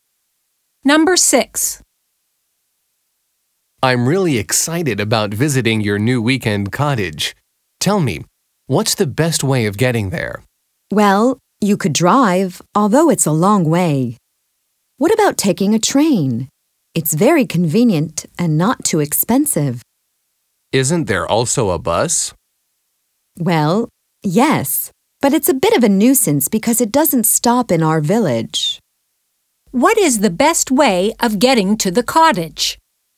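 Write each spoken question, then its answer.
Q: What is the best way of getting to the cottage?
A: By train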